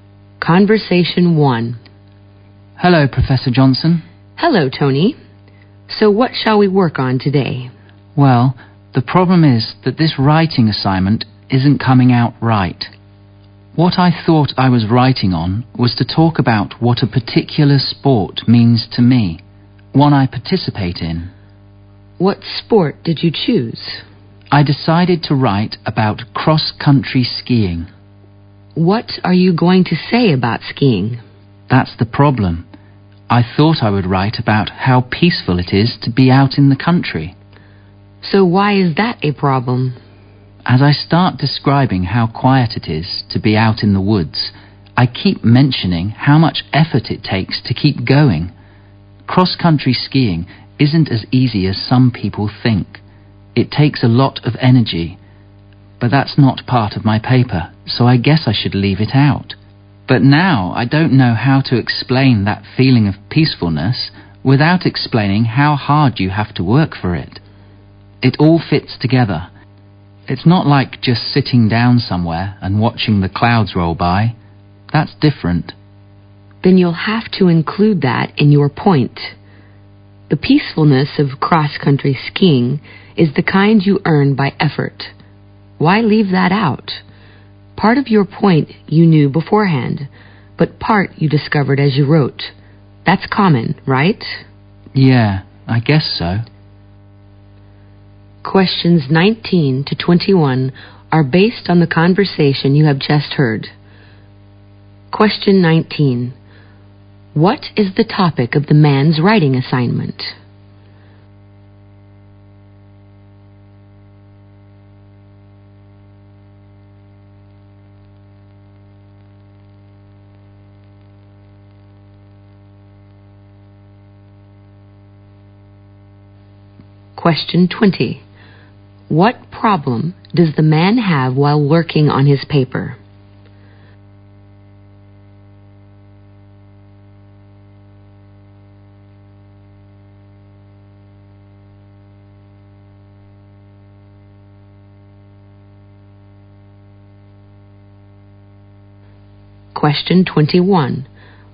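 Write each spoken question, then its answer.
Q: What is the topic of the man's writing assignment?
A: What a sport he takes part in (cross-country skiing) means to him.

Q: What problem does the man have while working on his paper?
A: He can't explain the peacefulness without describing the hard effort it takes.

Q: What does the woman say is common in writing papers?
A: Finding new points while you write.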